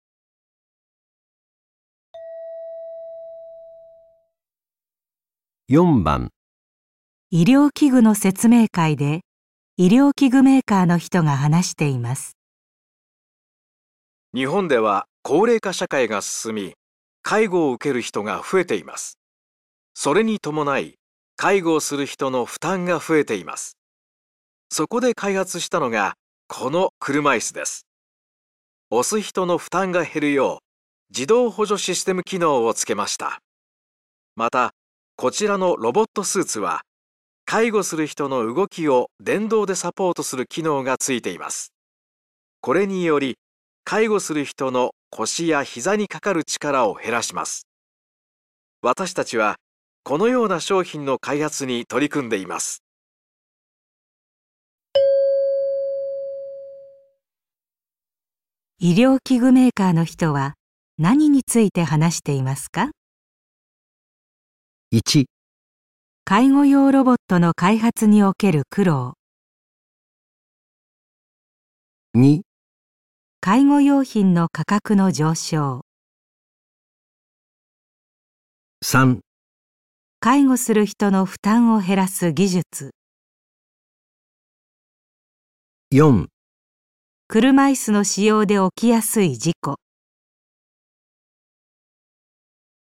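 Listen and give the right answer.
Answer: 介護する人の負担を減らす技術

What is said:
また、こちらのロボットスーツは介護する人の動きを電動でサポートする機能がついています。これにより介護する人の腰や膝にかかる力を減らします。私達はこのような商品の開発に取り組んでいます。
医療器具メーカーの人は何について話していますか。

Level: N2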